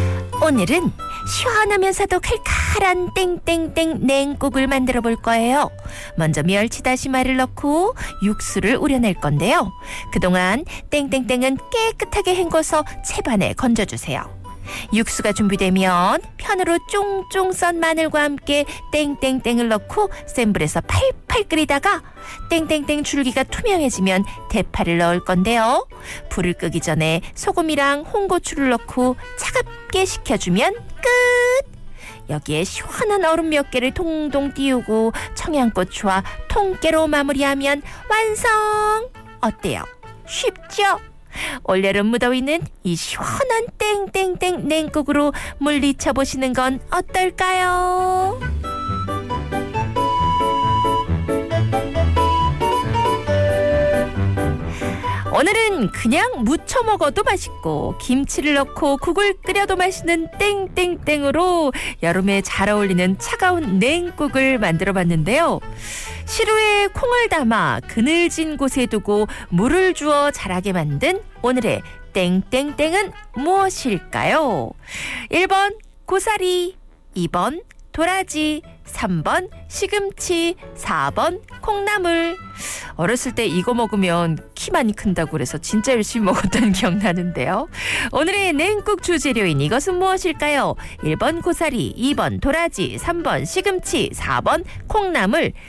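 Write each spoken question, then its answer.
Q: 오늘의 냉국 주재료인 이것은 무엇일까요? 1번 고사리, 2번 도라지, 3번 시금치, 4번 콩나물.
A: 4번: 콩나물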